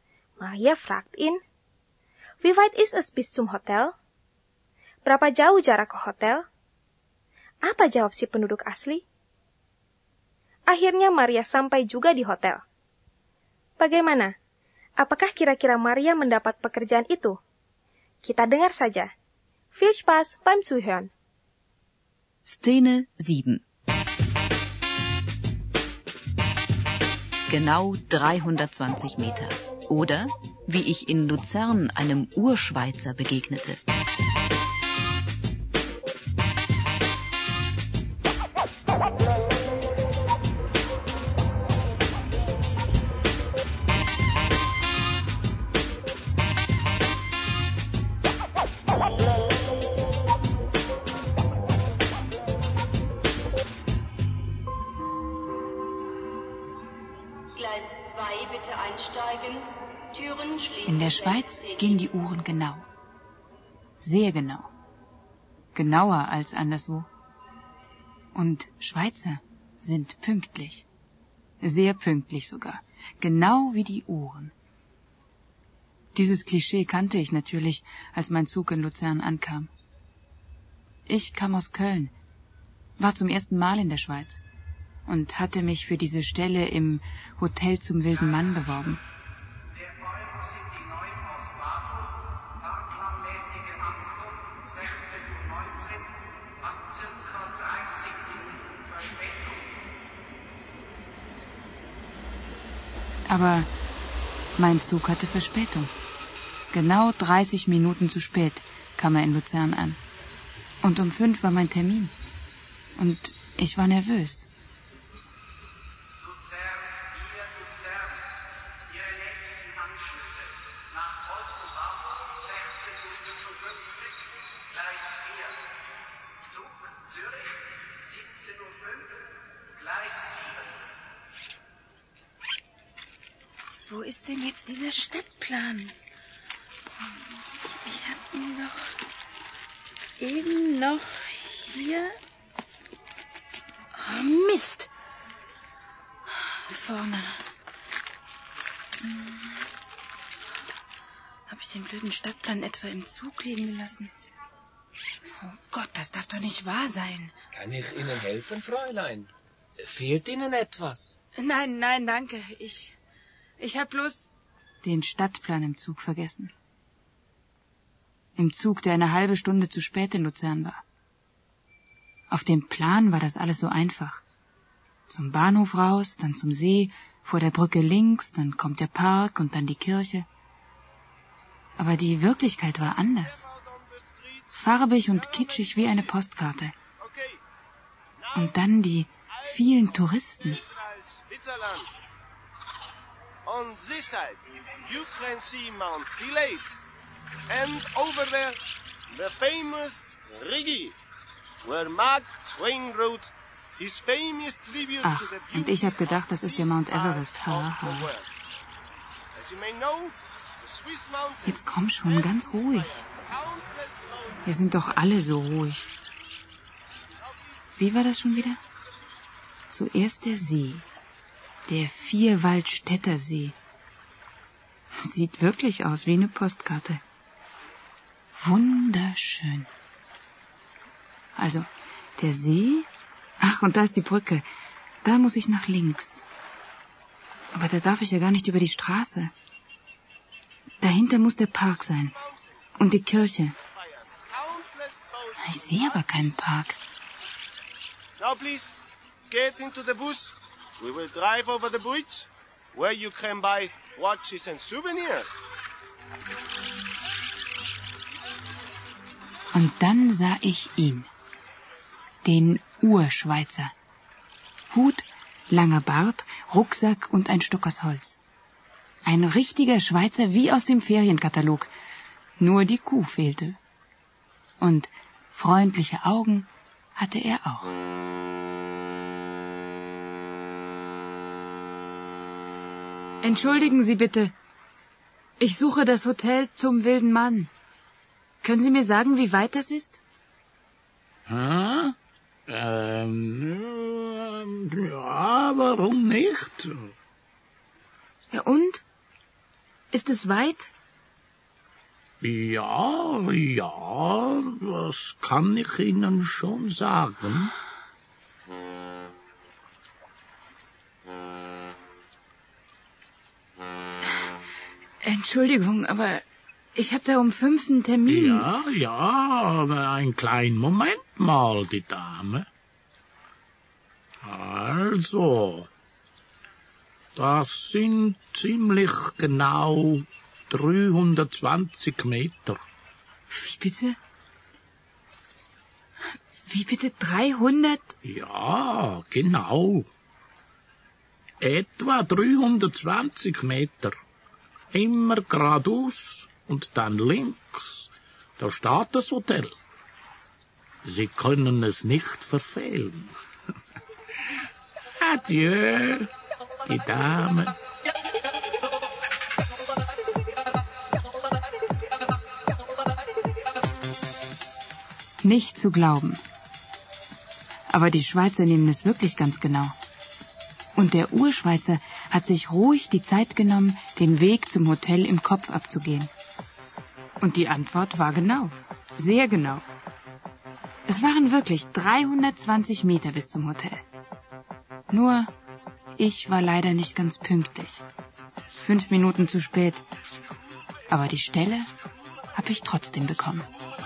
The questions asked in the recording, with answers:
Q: Apa jawab si penduduk asli?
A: Masih 320 meter sampai ke hotel, kata si penduduk asli.

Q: Apakah kira-kira Maria mendapat pekerjaan itu?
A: Nah, pendengar, sekarang kita bisa tenang Maria dapat kerjaan di hotel Sumbildenman, walaupun dia terlambat lima menit.